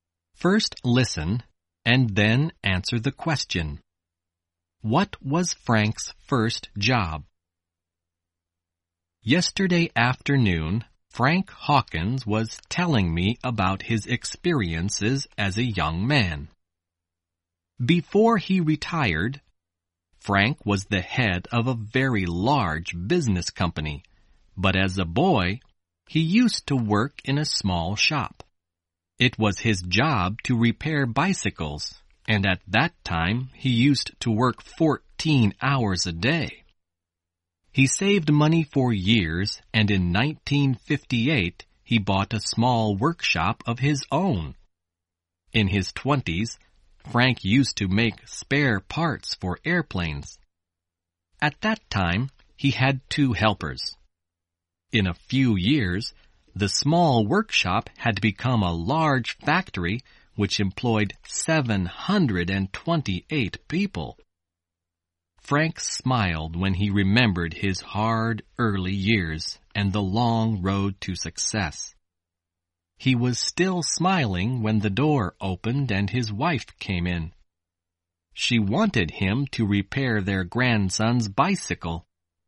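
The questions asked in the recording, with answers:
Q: What was Frank's first job?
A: He repaired bicycles in a small shop.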